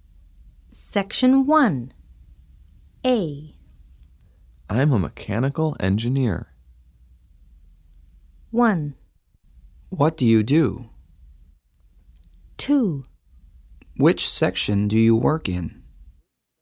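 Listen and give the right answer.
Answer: 1: What do you do?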